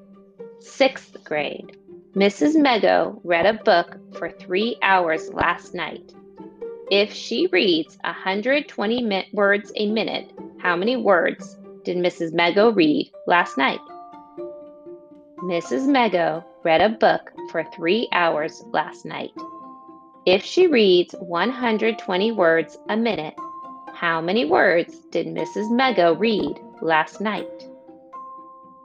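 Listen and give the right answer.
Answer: 21,600 words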